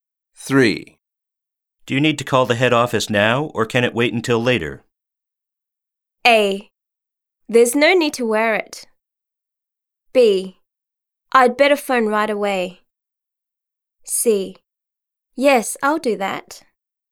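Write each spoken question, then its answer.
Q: Do you need to call the head office now, or can it wait until later?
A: B: I'd better phone right away.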